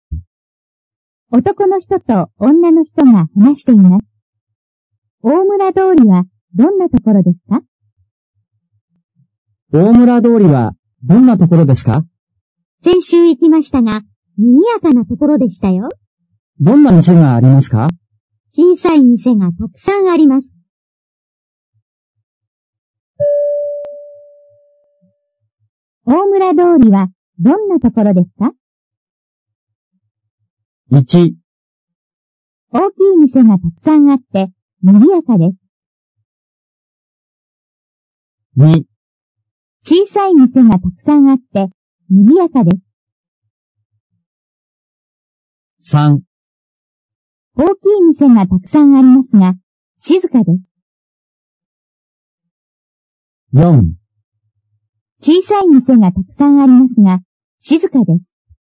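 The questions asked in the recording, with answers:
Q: 大村通りはどんなところですか?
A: 2: 小さい店がたくさんあって、賑やかです。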